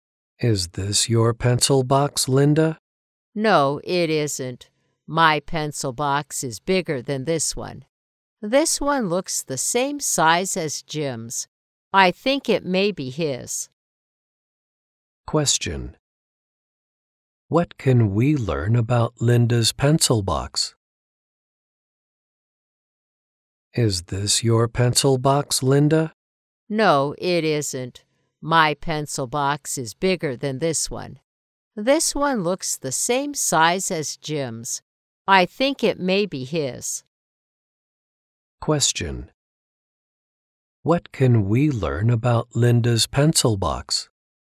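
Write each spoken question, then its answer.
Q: What can we learn about Linda's pencil box?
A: It is bigger than Jim's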